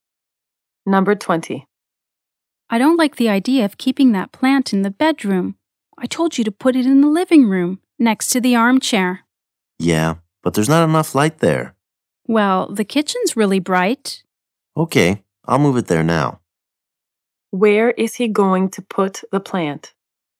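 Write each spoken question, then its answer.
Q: Where is he going to put the plant?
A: In the kitchen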